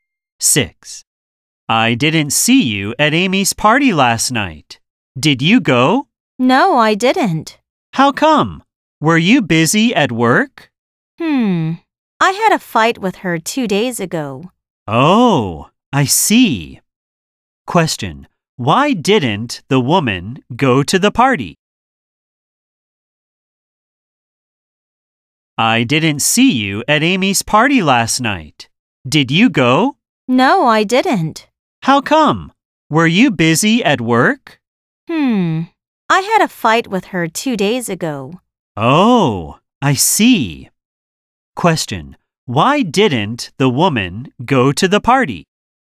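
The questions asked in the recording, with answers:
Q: Why didn't the woman go to the party?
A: She had a fight with Amy two days ago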